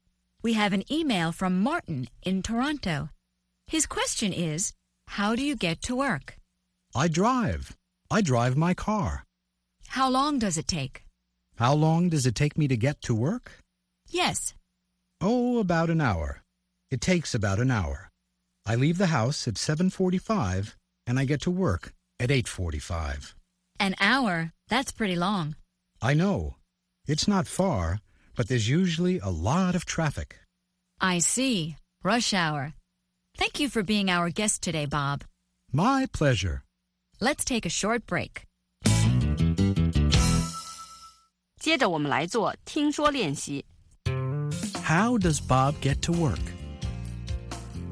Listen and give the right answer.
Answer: He drives his car.